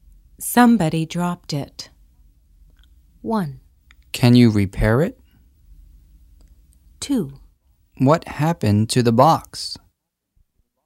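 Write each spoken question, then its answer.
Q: Somebody dropped it.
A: 2: What happened to the box?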